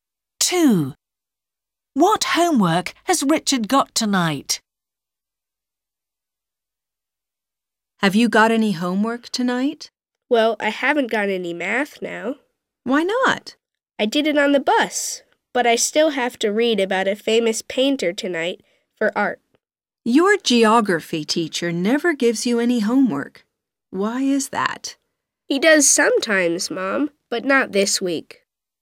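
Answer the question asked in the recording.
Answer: reading about a famous painter for art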